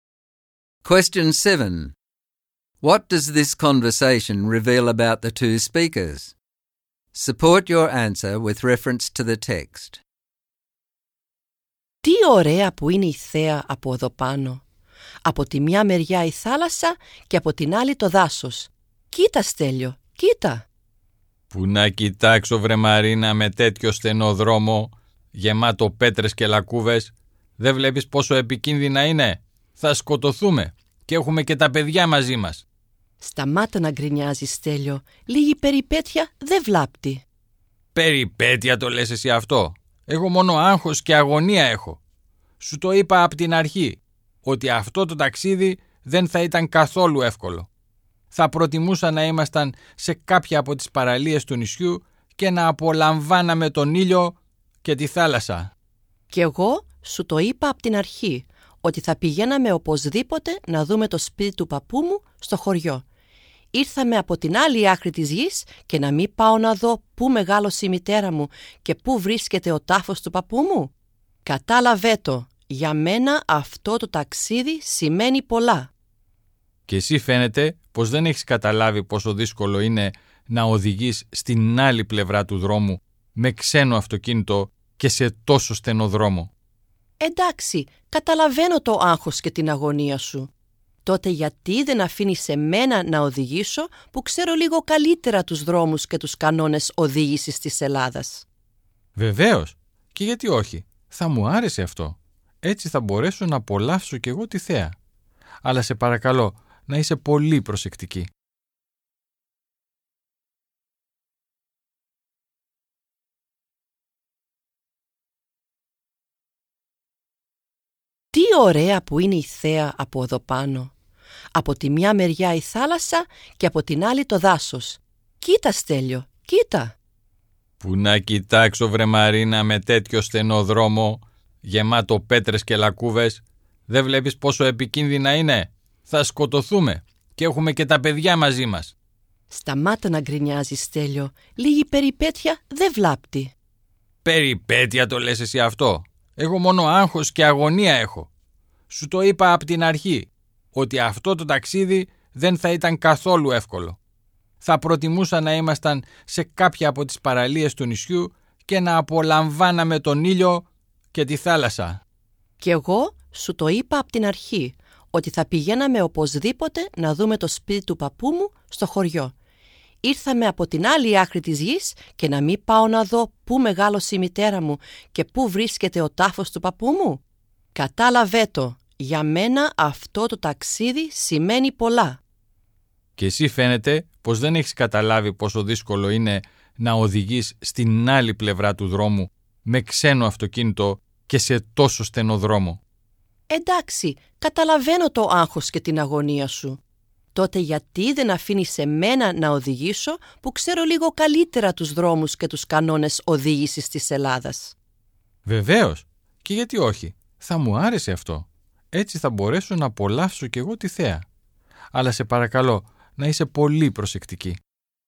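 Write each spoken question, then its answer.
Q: What does this conversation reveal about the two speakers?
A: Marina is adventurous and emotional about the trip, because she wants to see her grandfather's village and grave. Stelios is anxious and complaining, and would prefer the beach. He finds the narrow road dangerous and driving on the other side of the road hard. In the end they compromise: Marina offers to drive, and Stelios happily accepts.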